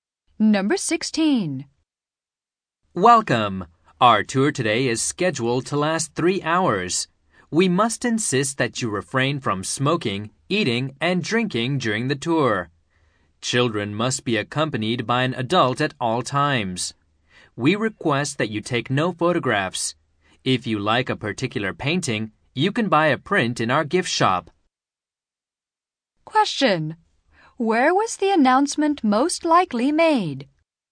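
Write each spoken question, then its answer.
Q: Where was the announcement most likely made?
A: At an art museum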